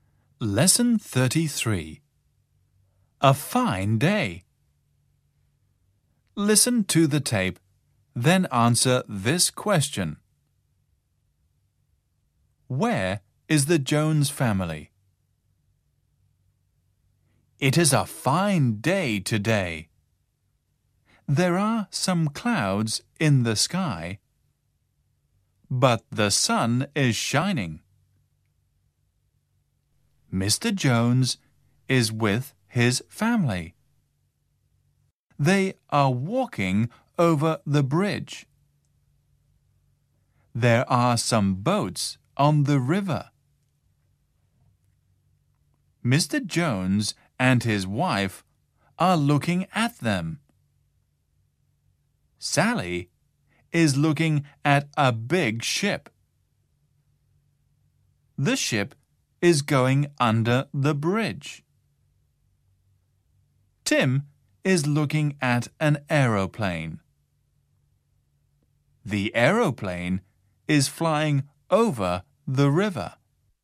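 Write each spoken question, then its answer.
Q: Where is the Jones family?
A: They are walking over the bridge.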